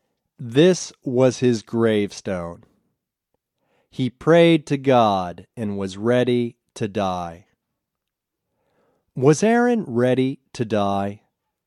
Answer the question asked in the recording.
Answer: Yes, Aaron was ready to die.